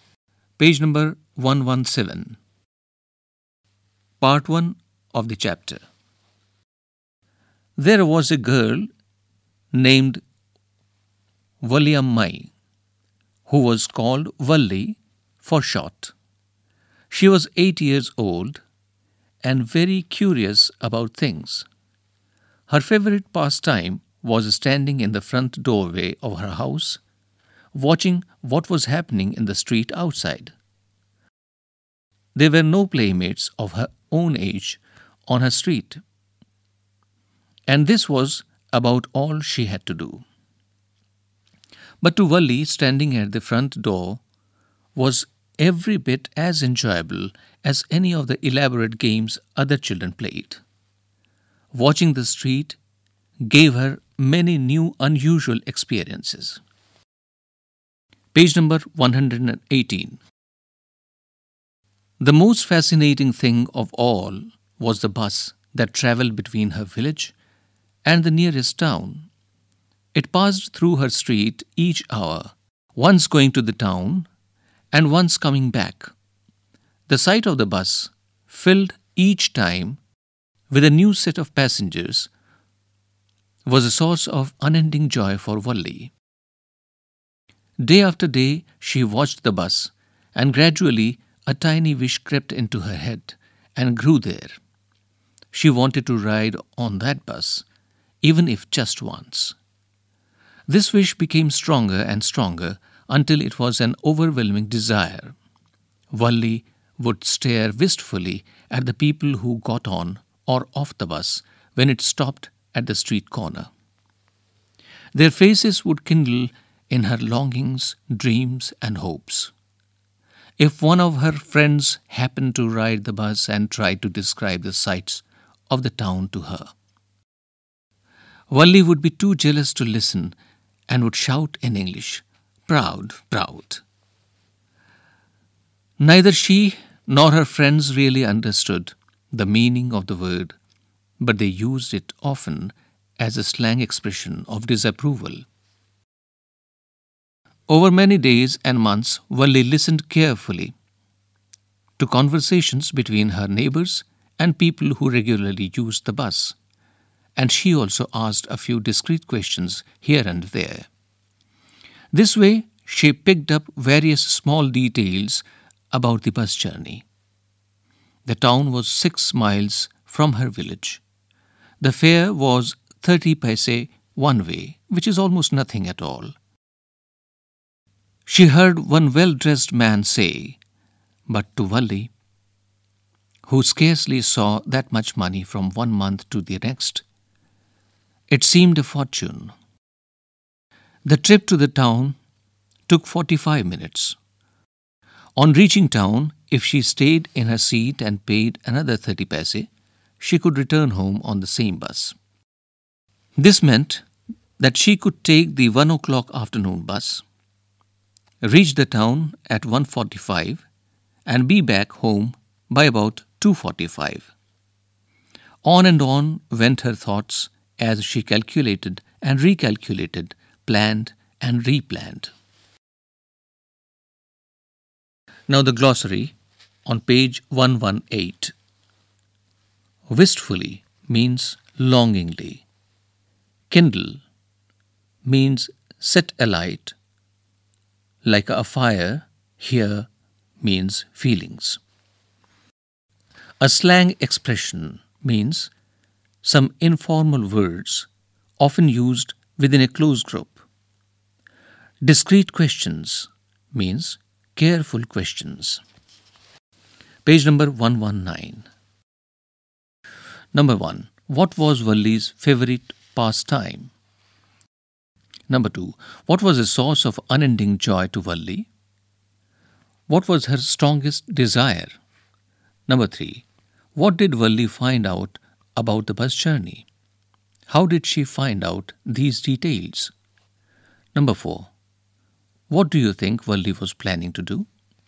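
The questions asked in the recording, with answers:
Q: What was Valli's favorite pastime?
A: Standing in the front doorway of her house, watching what was happening in the street

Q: What was a source of unending joy to Valli?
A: The sight of the bus filled each time with a new set of passengers

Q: What was her strongest desire?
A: To ride on that bus, even if just once

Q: What did Valli find out about the bus journey?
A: The town was 6 miles away, the fare was 30 paise one way, and the trip took 45 minutes; she could return on the same bus for another 30 paise

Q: How did she find out these details?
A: By listening to her neighbours and regular bus users, and asking a few discreet questions

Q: What do you think Valli was planning to do?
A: To take the 1 o'clock bus to town and come back home on the same bus by about 2:45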